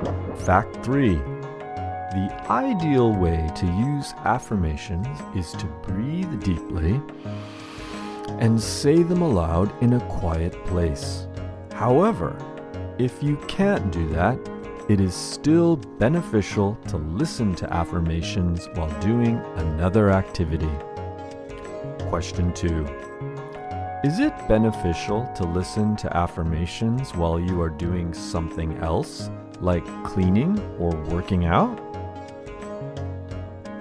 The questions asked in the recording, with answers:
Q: is it beneficial to listen to affirmations while you are doing something else, like cleaning or working out?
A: However, it is also beneficial to listen to affirmations while you are doing something else like cleaning or working out.